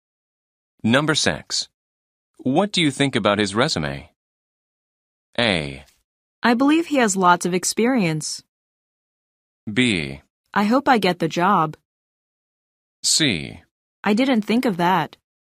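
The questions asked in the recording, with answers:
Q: What do you think about his resume?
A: A: I believe he has lots of experience.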